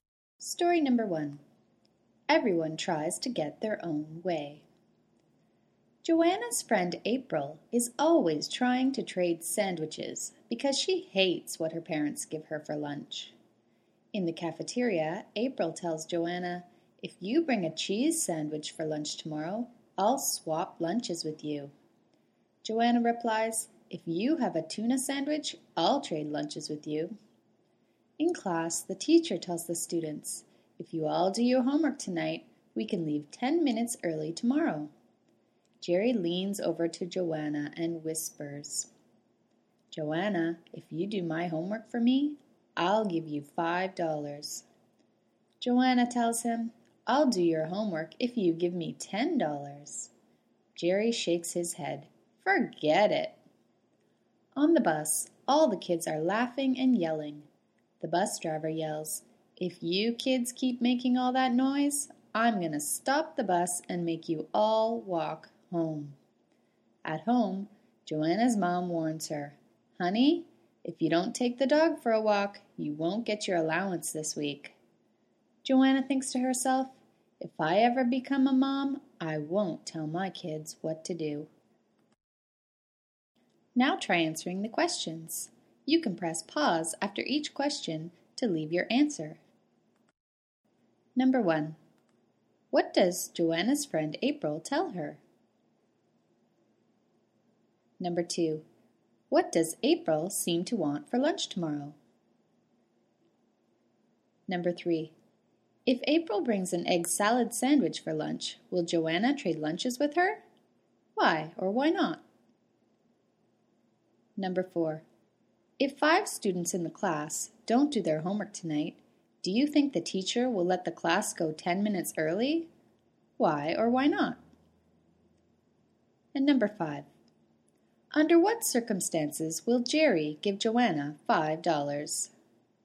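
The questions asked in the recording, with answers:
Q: what does Joanna's friend April tell her?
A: If Joanna brings a cheese sandwich tomorrow, April will swap lunches with her

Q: what does April seem to want for lunch tomorrow?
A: A cheese sandwich

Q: if April brings an egg salad sandwich for lunch, will Joanna trade lunches with her?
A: No, Joanna will only trade for a tuna sandwich

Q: if 5 students in the class don't do their homework tonight, do you think the teacher will let the class go 10 minutes early?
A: No, all the students must do their homework

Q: under what circumstances will Jerry give Joanna $5?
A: If Joanna does his homework for him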